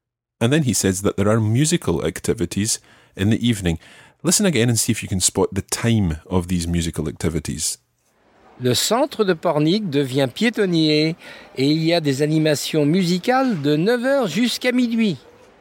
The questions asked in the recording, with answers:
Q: Listen again and see if you can spot the time of these musical activities.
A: So from 9h, de 9h à minuit.